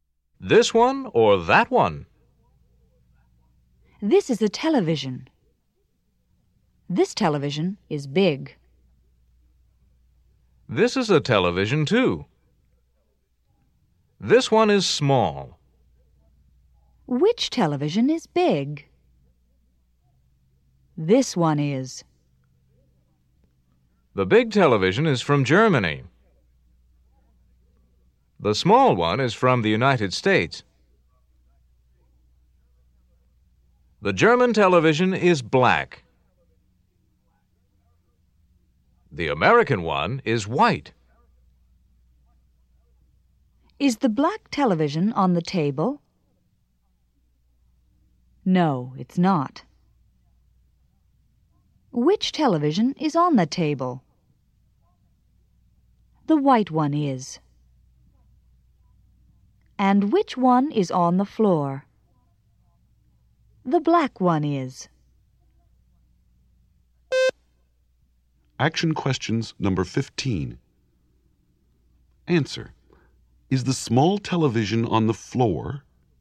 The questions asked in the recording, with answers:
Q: Is the small television on the floor?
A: No, it's not.